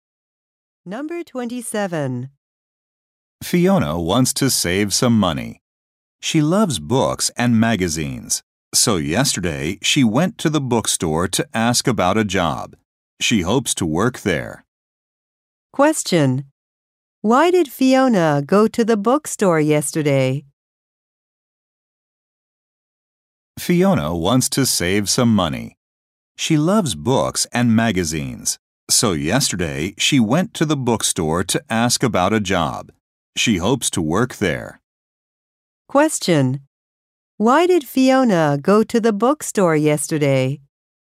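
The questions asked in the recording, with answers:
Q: Why did Fiona go to the bookstore yesterday?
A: To ask about a job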